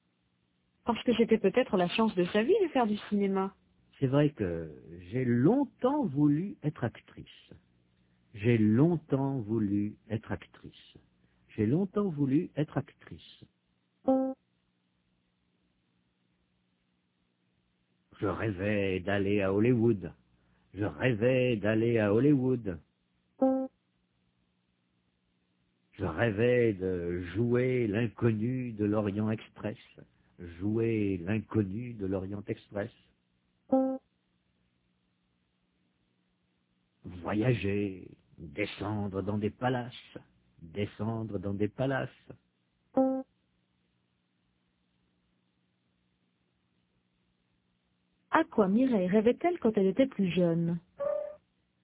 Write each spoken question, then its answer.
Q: À quoi Mireille rêvait-elle quand elle était plus jeune?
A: Elle rêvait d'aller à Hollywood.